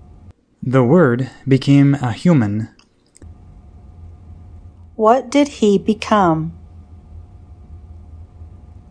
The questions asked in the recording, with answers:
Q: What did he become?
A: He became a human.